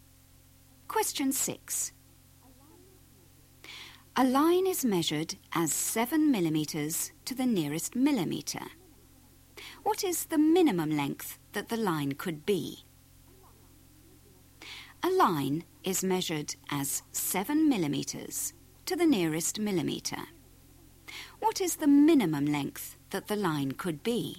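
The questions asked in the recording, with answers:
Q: What is the minimum length that the line could be?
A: 6.5 mm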